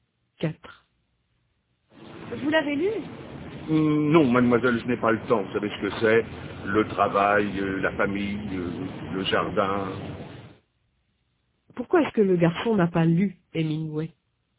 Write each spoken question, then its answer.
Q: Pourquoi est-ce que le garçon n'a pas lu Hemingway?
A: Parce qu'il n'a pas le temps.